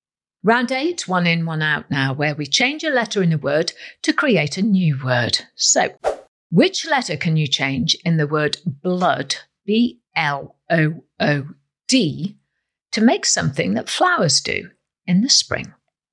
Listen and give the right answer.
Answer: if you change the letter D for a letter M, you get the word bloom